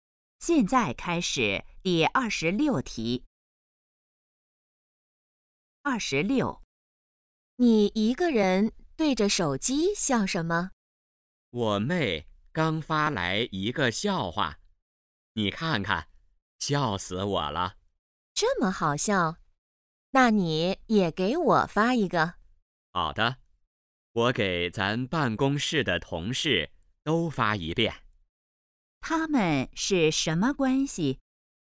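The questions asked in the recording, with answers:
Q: 他们是什么关系?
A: 同事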